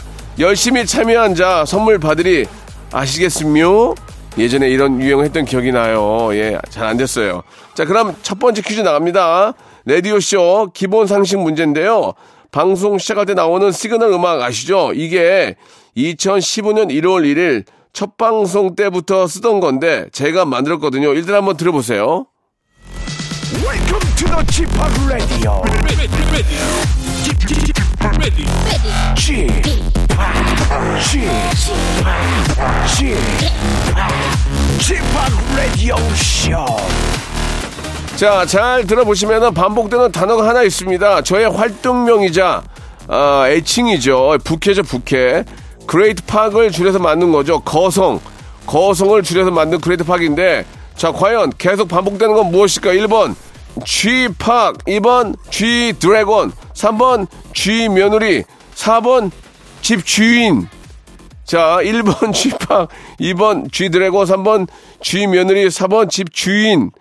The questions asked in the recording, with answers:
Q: 자, 과연 계속 반복되는 건 무엇일까?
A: 자, 첫 번째 퀴즈의 정답은 1번 쥐파기였습니다